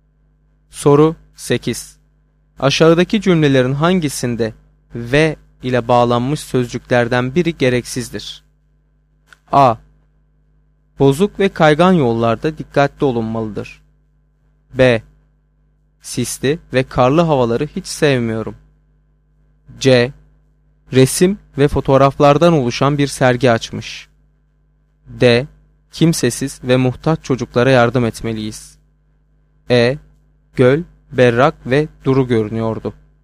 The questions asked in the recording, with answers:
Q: Aşağıdaki cümlelerin hangisinde ve ile bağlanmış sözcüklerden biri gereksizdir?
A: Doğru cevap E şıkkı.